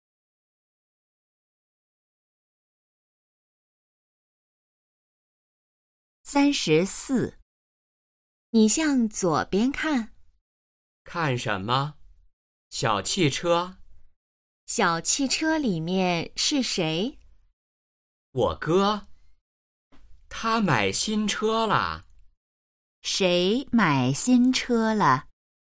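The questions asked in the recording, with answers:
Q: 谁买新车了?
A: 哥哥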